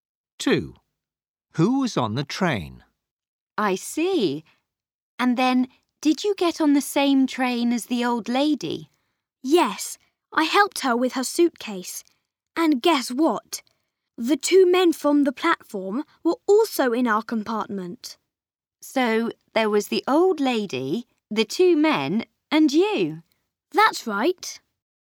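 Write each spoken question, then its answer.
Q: Who was on the train?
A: The old lady, the two men and Max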